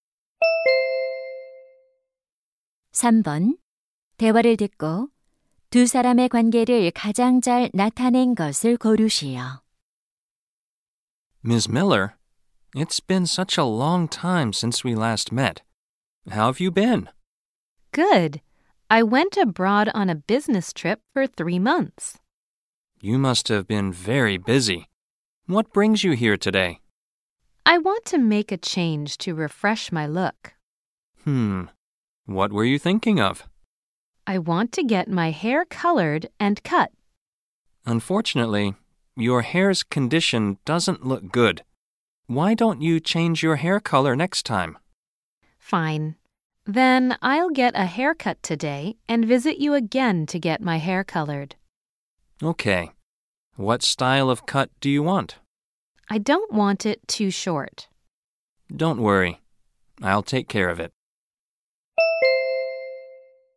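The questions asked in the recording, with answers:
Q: 두 사람의 관계를 가장 잘 나타낸 것을 고르시오.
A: 미용사 - 손님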